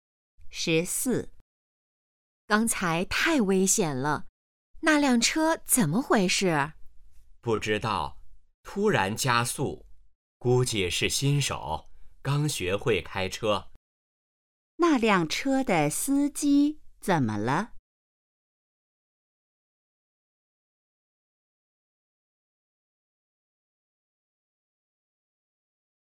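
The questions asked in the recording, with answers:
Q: 那辆车的司机怎么了?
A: 可能是新手,刚学会开车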